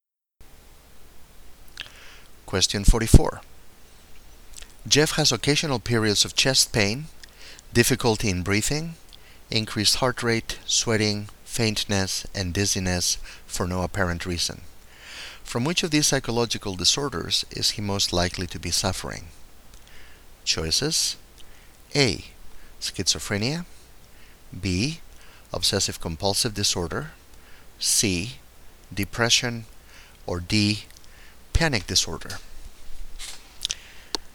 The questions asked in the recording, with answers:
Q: From which of these psychological disorders is he most likely to be suffering?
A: Well, it sounds like Jeff has panic disorder.